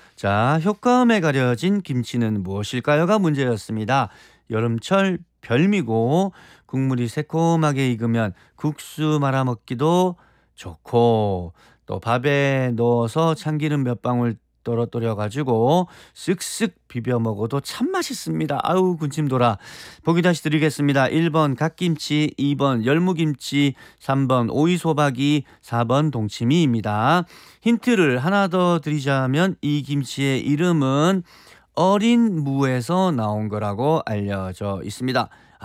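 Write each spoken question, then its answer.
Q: 효과음에 가려진 김치는 무엇일까요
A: 2: 열무김치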